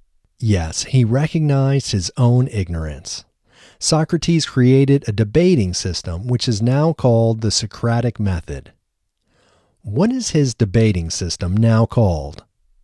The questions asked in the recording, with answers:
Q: What is his debating system now called?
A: His debating system is now called the Socratic method.